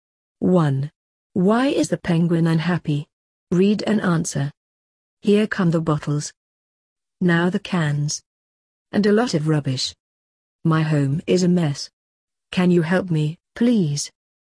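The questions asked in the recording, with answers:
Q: Why is the penguin unhappy?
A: His home is a mess: it's full of bottles, cans and rubbish.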